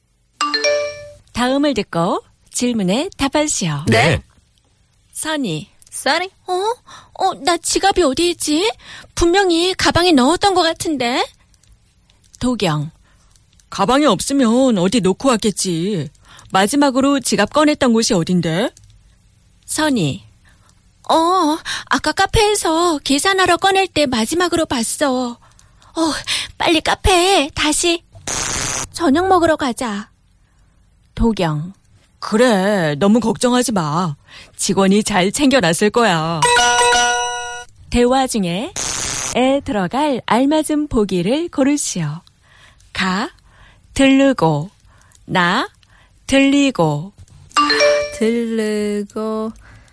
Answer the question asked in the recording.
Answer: 가 들르고. 들르고. Yeah, 다시 들르고 저녁 먹으러 가자.